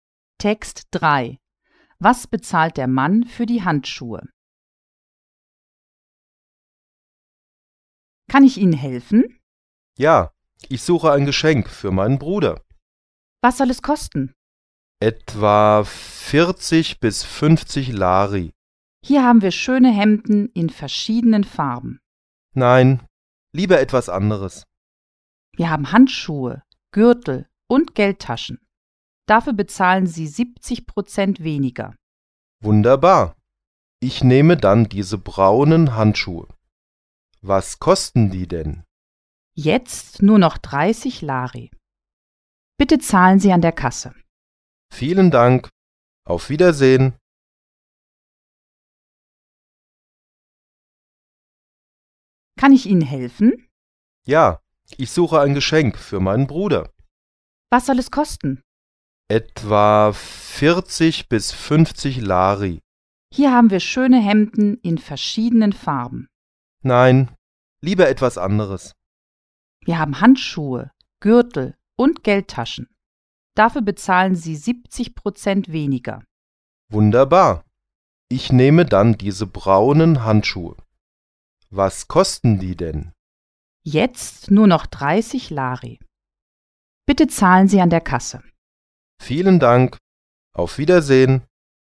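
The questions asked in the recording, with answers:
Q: Was bezahlt der Mann für die Handschuhe?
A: 30 Lari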